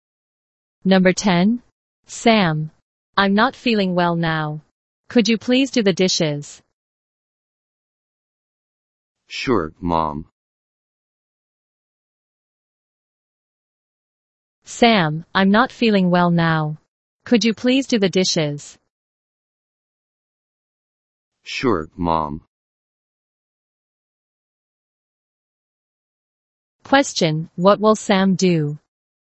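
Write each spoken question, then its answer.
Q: what will Sam do?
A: Do the dishes.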